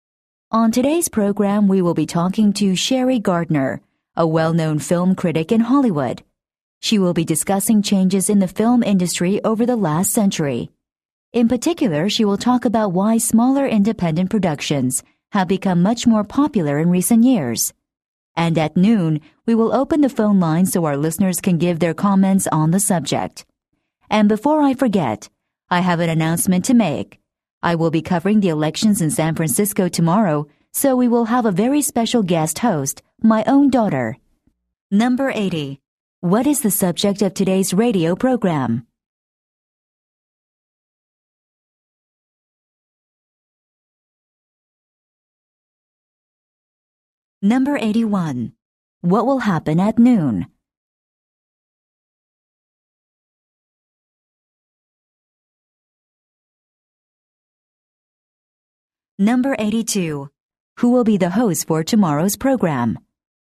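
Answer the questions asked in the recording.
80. Changes in the film industry over the last century
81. The phone line will open for listeners to give comments
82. The host's daughter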